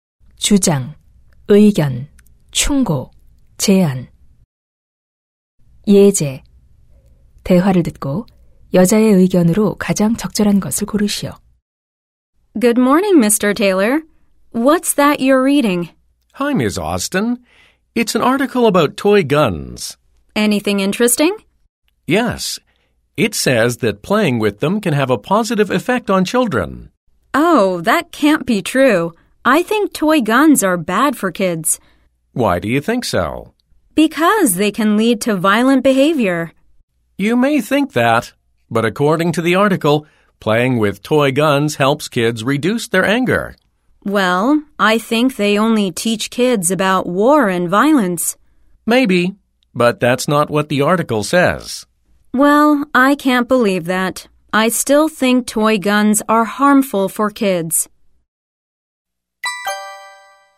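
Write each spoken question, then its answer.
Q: 대화를 듣고 여자의 의견으로 가장 적절한 것을 고르시오.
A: 장난감 총은 아이들에게 해롭다.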